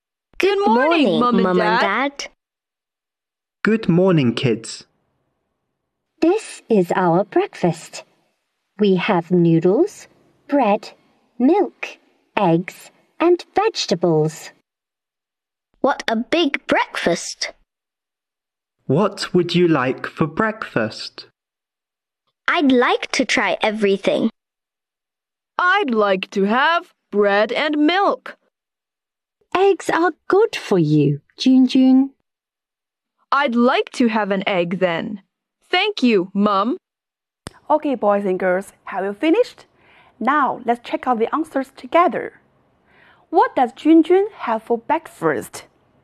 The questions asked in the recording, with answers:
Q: What does Junjun have for breakfast?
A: She has bread, an egg, and milk for breakfast.